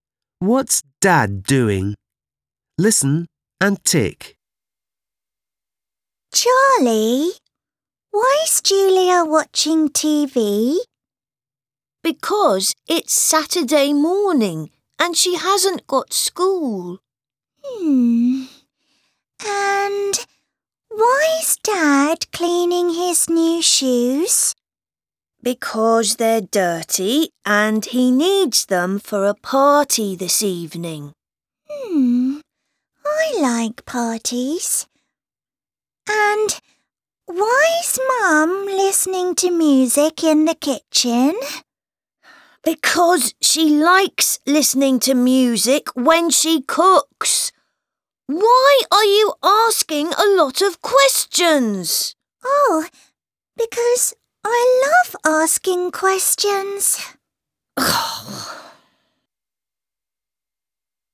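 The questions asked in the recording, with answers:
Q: What's Dad doing?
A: Cleaning his new shoes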